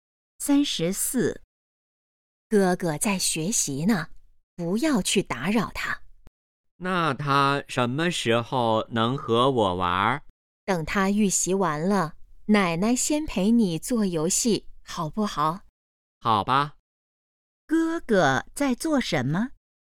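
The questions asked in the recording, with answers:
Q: 哥哥在做什么?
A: 预习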